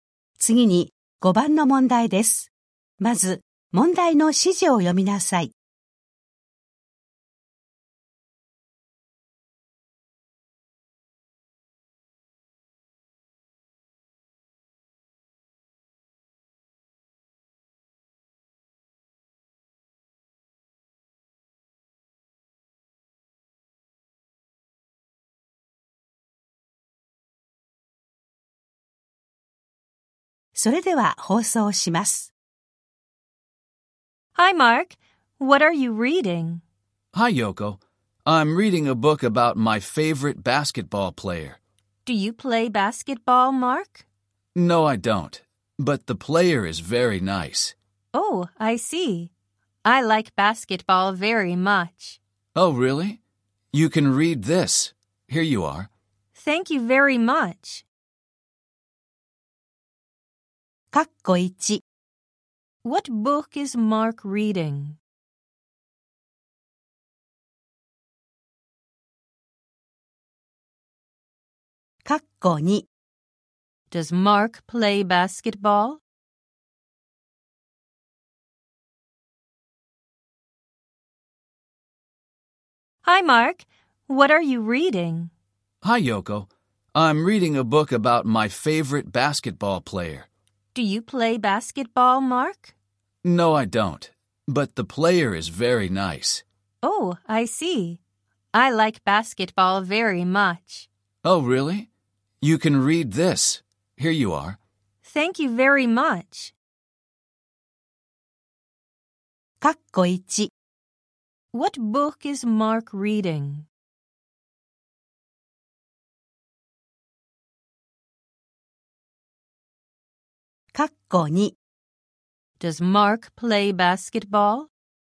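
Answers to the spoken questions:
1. A book about his favorite basketball player
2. No, he doesn't.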